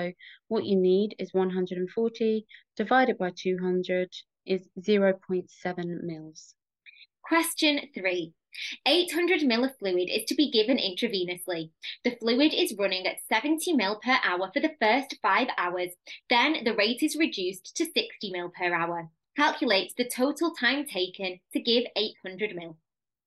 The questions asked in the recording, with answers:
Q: Calculate the total time taken to give 800 ml.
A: which would give you 12.5 hours